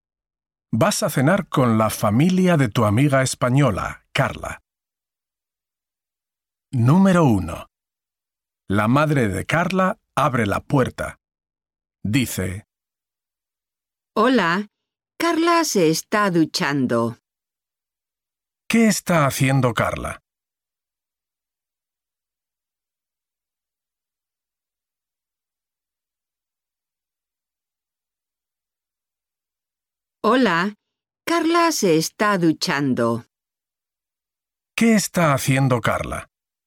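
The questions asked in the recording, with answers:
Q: ¿Qué está haciendo Carla?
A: Se está duchando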